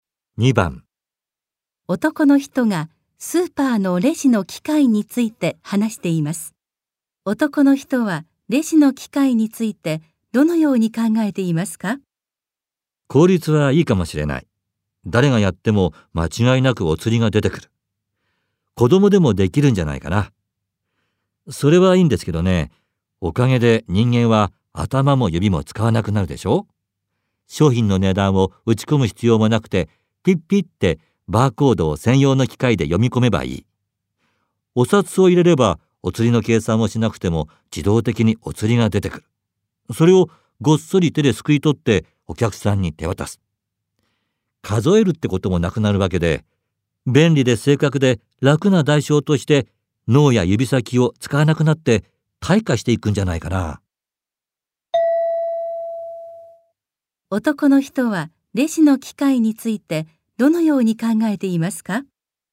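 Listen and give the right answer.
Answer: 便利で正確だが、人間が頭や指を使わなくなり退化していく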